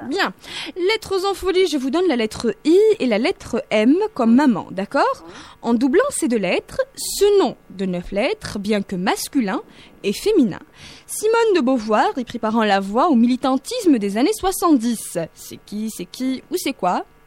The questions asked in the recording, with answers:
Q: C'est qui ou c'est quoi ?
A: Le féminisme. Effectivement